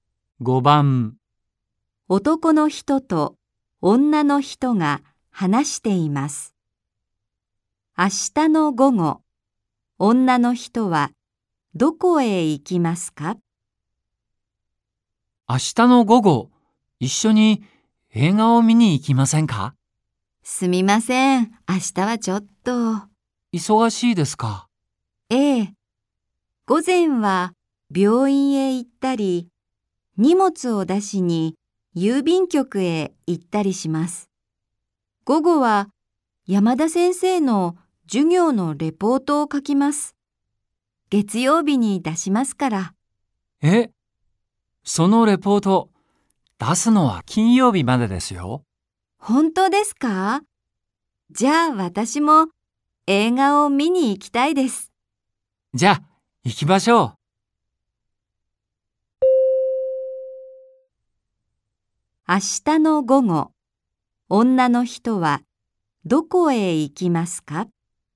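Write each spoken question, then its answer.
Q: 明日の午後、女の人はどこへ行きますか?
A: 映画館(映画を見に行く)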